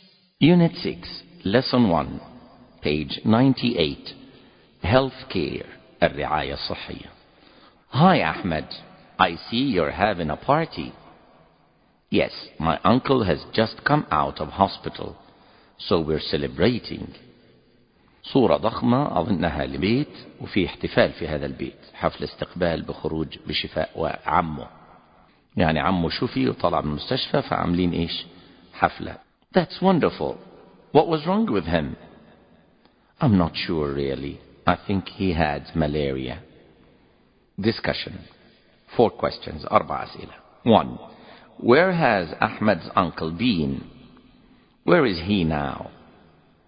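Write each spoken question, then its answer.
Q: Where has Ahmed's uncle been?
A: In hospital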